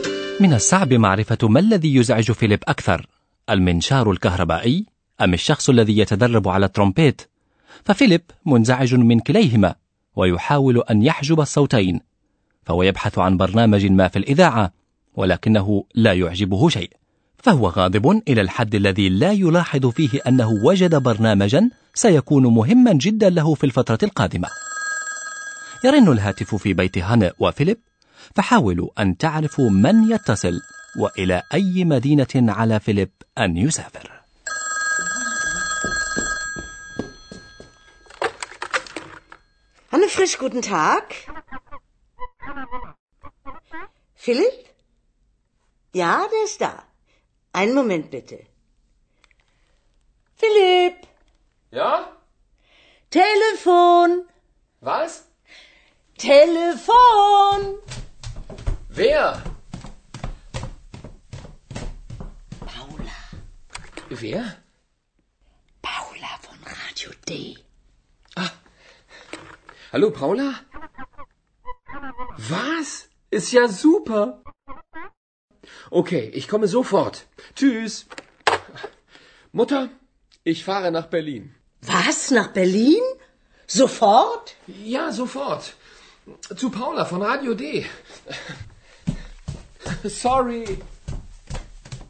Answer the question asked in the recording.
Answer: لقد اتصلت امرأة اسمها باولا بفيليب والظاهر أنها تعمل في الإذاعة في راديو دي وأن على فيليب أن يسافر إلى برلين